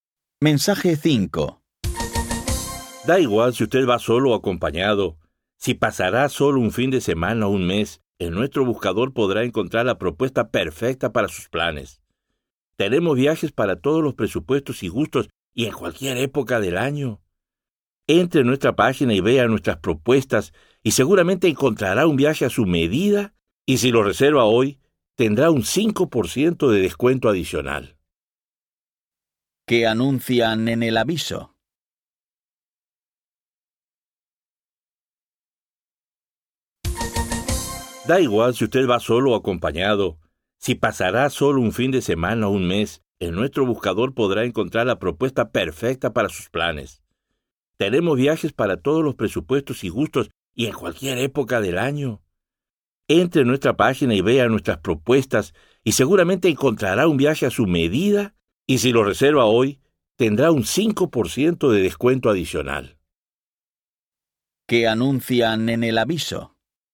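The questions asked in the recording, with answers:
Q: ¿Qué anuncian en el aviso?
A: Un buscador de viajes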